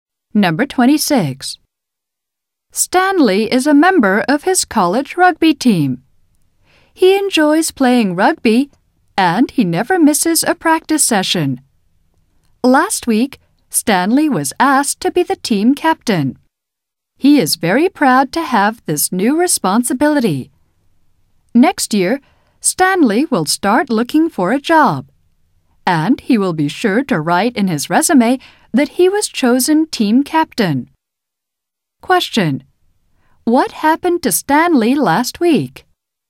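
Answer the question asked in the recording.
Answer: He was asked to be the team captain.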